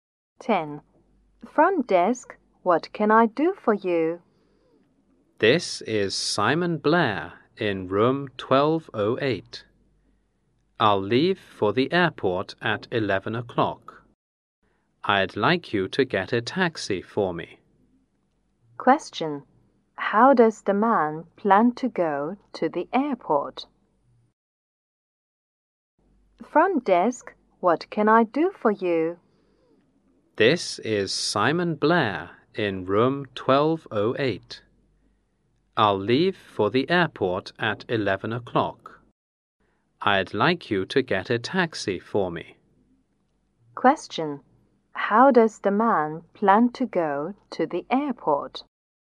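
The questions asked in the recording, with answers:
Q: How does the man plan to go to the airport?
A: By taxi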